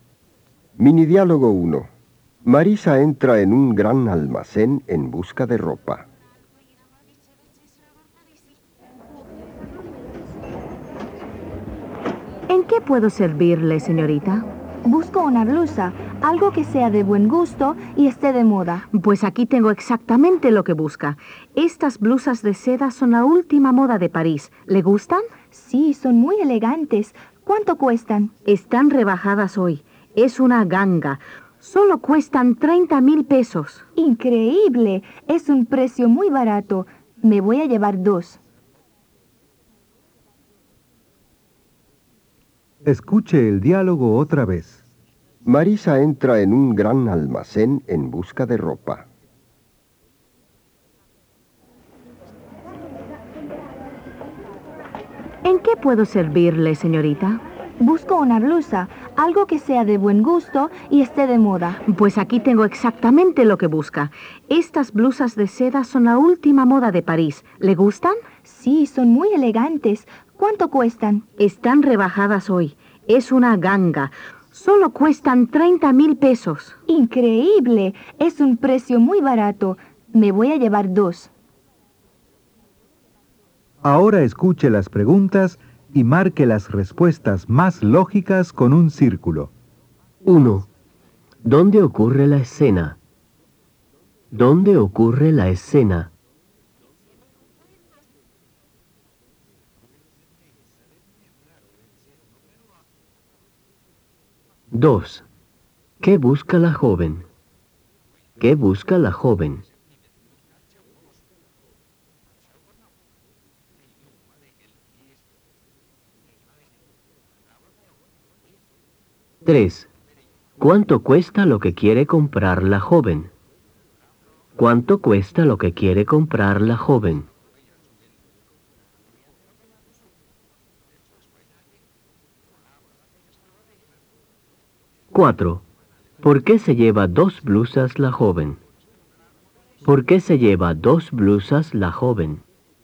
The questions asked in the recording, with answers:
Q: ¿Dónde ocurre la escena?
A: B. En un gran almacén.

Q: ¿Qué busca la joven?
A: A. Una blusa.

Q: ¿Cuánto cuesta lo que quiere comprar la joven?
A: B. 30,000 pesos.

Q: ¿Por qué se lleva dos blusas la joven?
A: A. Porque son baratas.